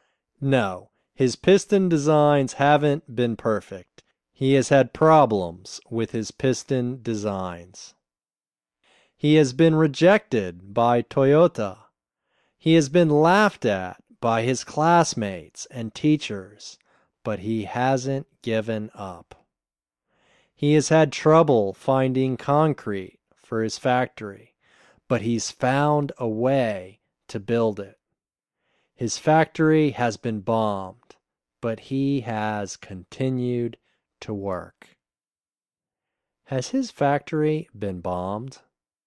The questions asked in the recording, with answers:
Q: Has his factory been bombed?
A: Yes, his factory has been bombed.